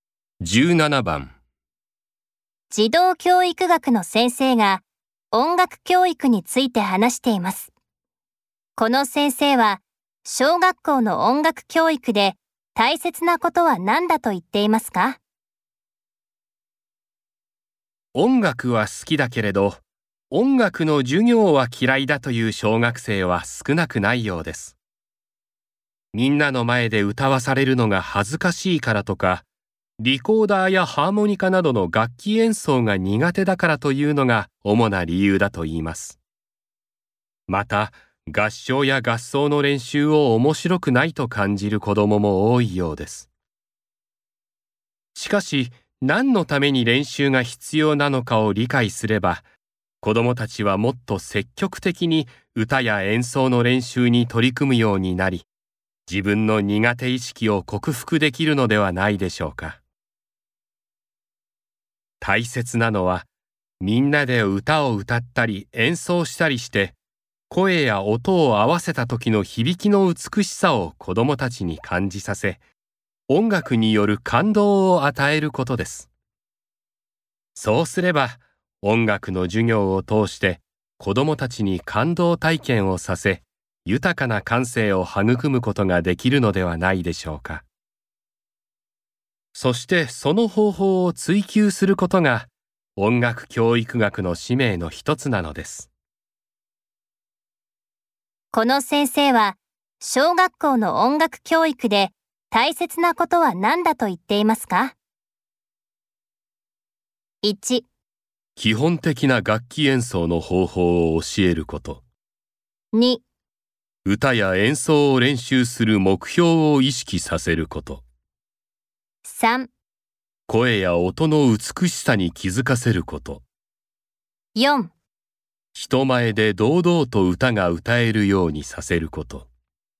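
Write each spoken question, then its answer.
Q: この先生は小学校の音楽教育で大切なことは何だと言っていますか?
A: 3: 声や音の美しさに気づかせること。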